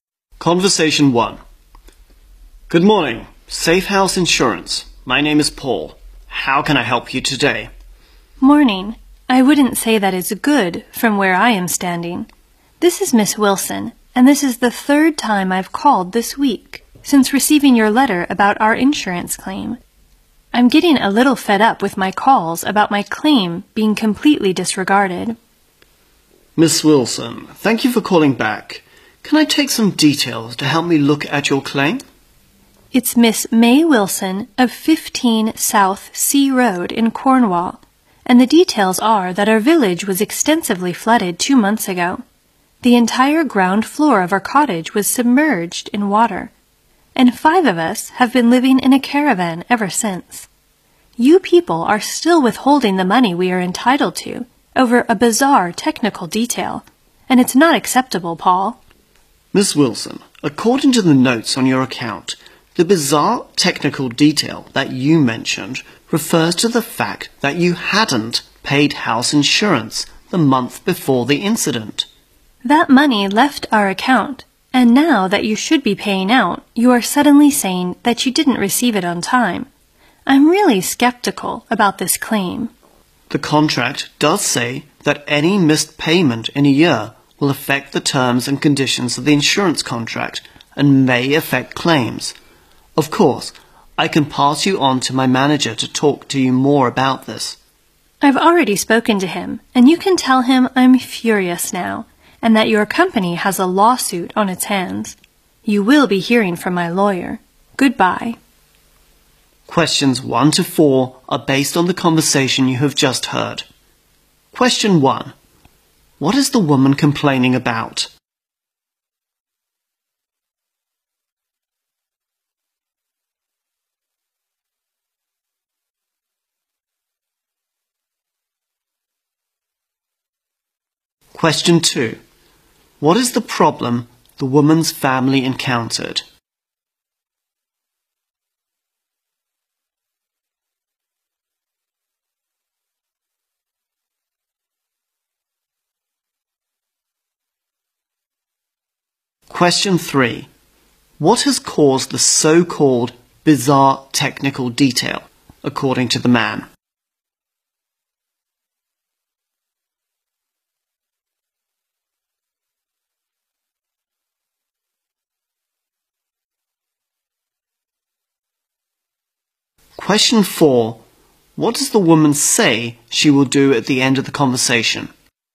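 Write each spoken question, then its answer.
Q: What is the woman complaining about?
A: Her calls about her insurance claim have been ignored and the money hasn't been paid.

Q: What is the problem the woman's family encountered?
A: Their village flooded and the cottage's ground floor went under water, so they have been living in a caravan.

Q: What has caused the so-called bizarre technical detail, according to the man?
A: She hadn't paid the house insurance the month before the flood.

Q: What does the woman say she will do at the end of the conversation?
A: Take legal action against the company.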